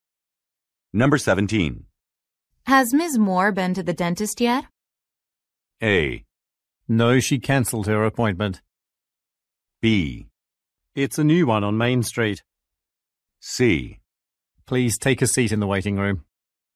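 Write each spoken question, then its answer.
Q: Has Ms. Moore been to the dentist yet?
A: A: No, she cancelled her appointment.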